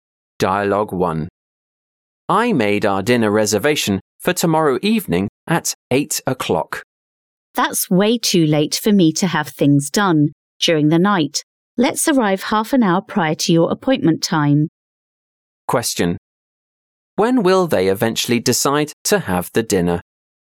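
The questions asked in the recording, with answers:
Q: When will they eventually decide to have the dinner?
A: At 7:30 tomorrow evening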